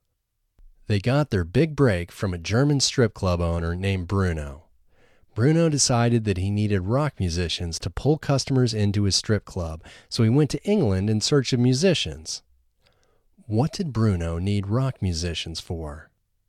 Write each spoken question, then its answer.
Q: What did Bruno need rock musicians for?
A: Bruno needed rock musicians to pull customers into his strip club.